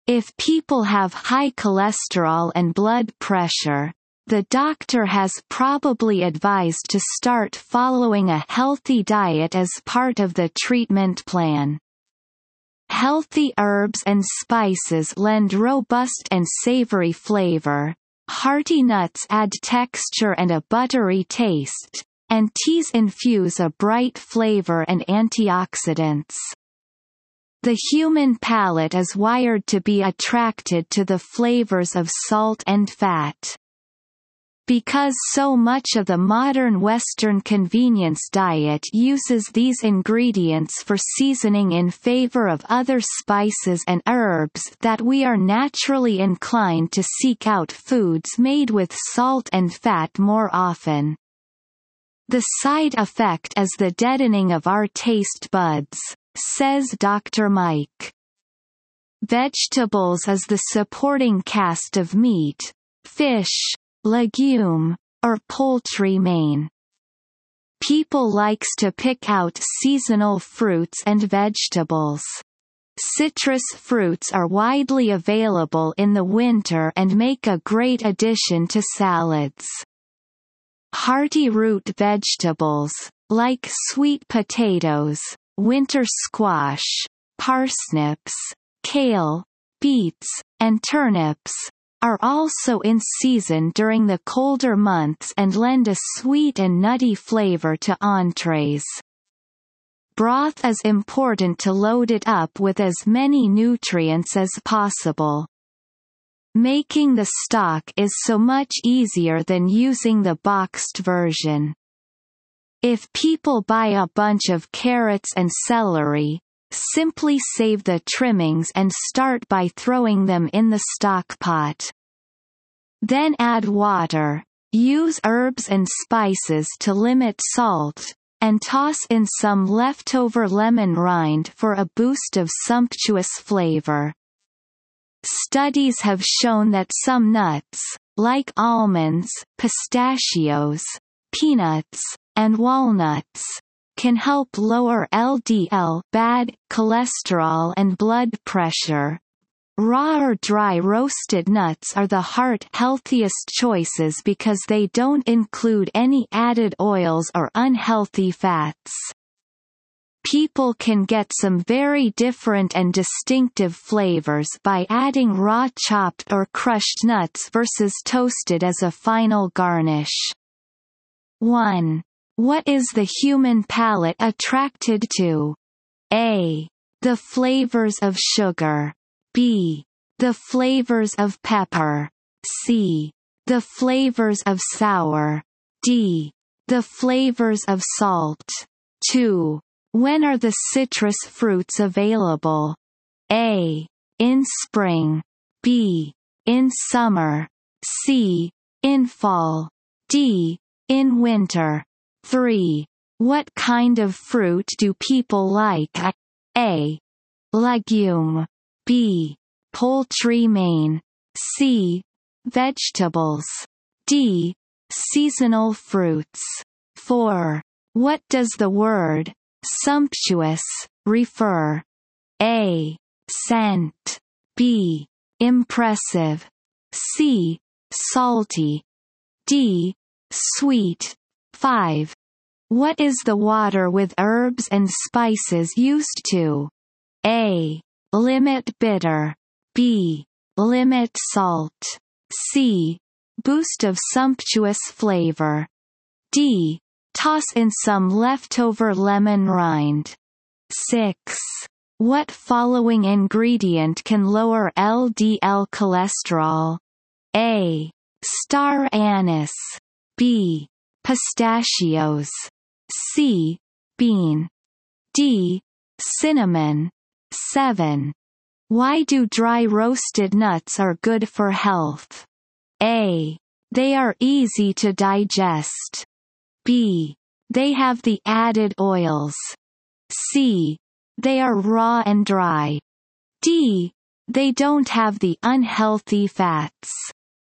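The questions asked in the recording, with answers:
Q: What is the human palate attracted to?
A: D: The flavors of salt.

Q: When are the citrus fruits available?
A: D: In winter.

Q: What kind of fruit do people like?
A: D: Seasonal fruits.

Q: What is the water with herbs and spices used to?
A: B: Limit salt.

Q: What following ingredient can lower LDL cholesterol?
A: B: Pistachios.

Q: Why do dry roasted nuts are good for health?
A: D: They don't have the unhealthy fats.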